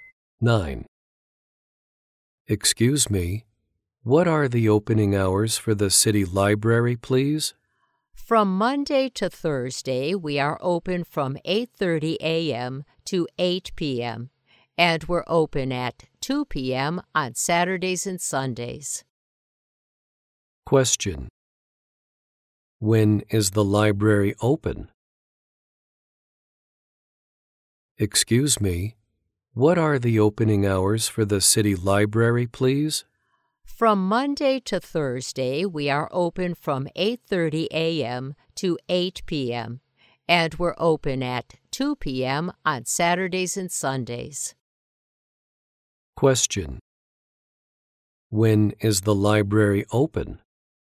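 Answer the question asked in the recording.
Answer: 8:30 a.m. to 8 p.m. Monday to Thursday; from 2 p.m. on weekends.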